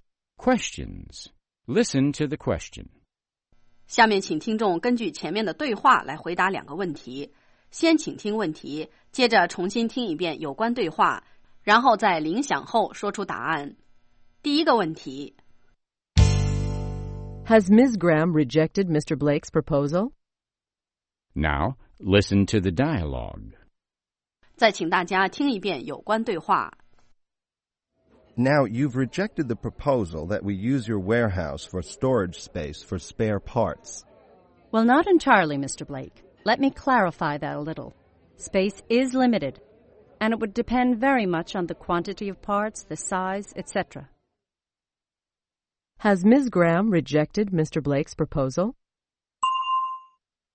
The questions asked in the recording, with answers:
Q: Has Ms. Graham rejected Mr. Blake's proposal?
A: No, she hasn't. She is still willing to consider it.